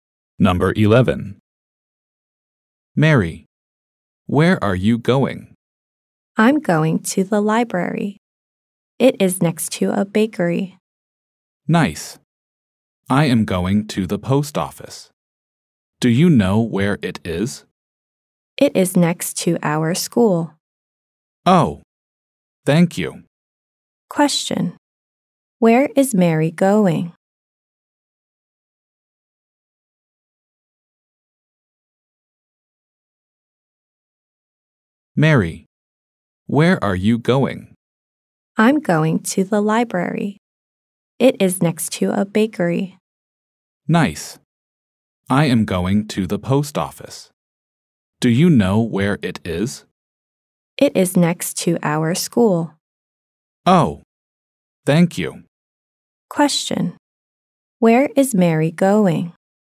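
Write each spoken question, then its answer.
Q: Where is Mary going?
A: To the library.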